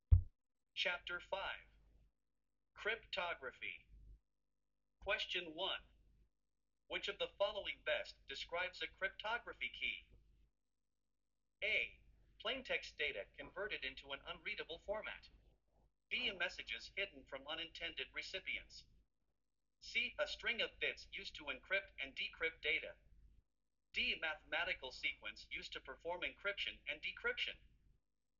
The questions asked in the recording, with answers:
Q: Which of the following best describes a cryptography key?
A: The correct answer is C.